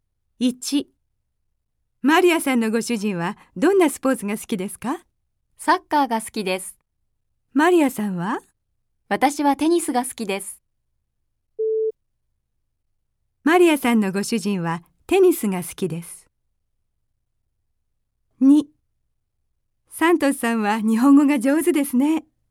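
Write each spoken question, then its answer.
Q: マリアさんのご主人はテニスが好きです。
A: ×(サッカーが好きです)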